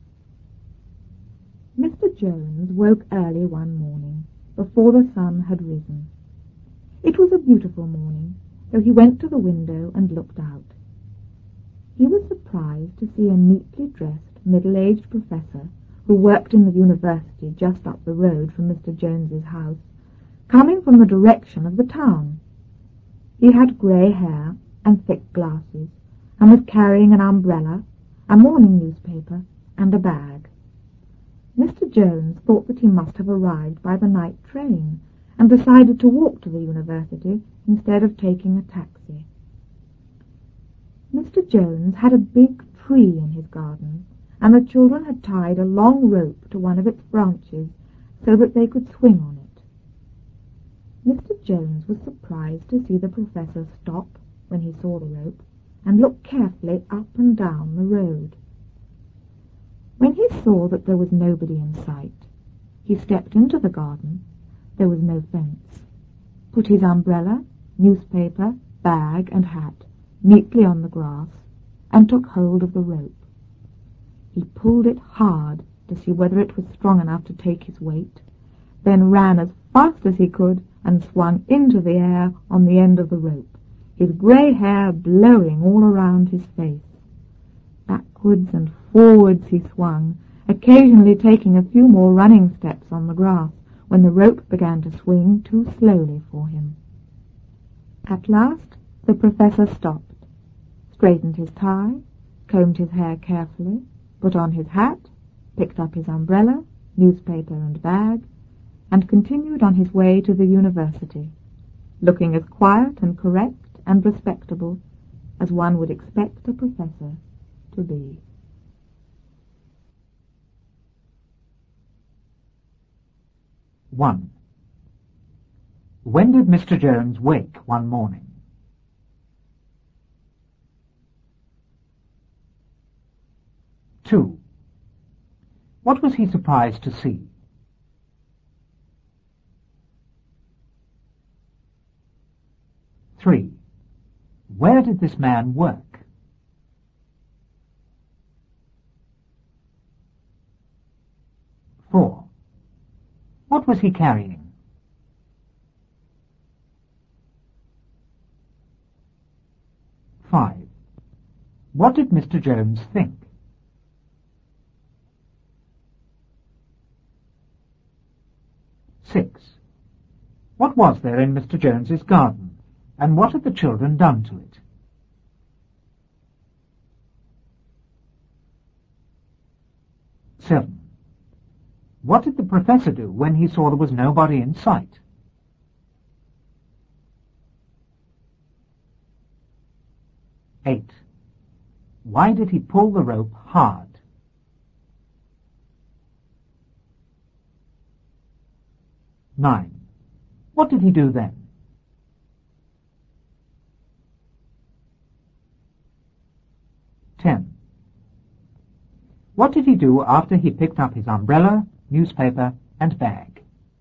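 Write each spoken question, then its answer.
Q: When did Mr. Jones wake one morning?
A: Early, before the sun had risen

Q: What was he surprised to see?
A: A neatly dressed, middle-aged professor coming from the direction of the town

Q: Where did this man work?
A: In the university just up the road

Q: What was he carrying?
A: An umbrella, a morning newspaper and a bag

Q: What did Mr. Jones think?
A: He had arrived by the night train and decided to walk to the university instead of taking a taxi

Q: What was there in Mr. Jones's garden? And what had the children done to it?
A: A big tree; they had tied a long rope to one of its branches to swing on

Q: What did the professor do when he saw there was nobody in sight?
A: He stepped into the garden, put his things on the grass and took hold of the rope

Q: Why did he pull the rope hard?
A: To see whether it was strong enough to take his weight

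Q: What did he do then?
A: He ran as fast as he could and swung into the air on the rope

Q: What did he do after he picked up his umbrella, newspaper, and bag?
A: He continued on his way to the university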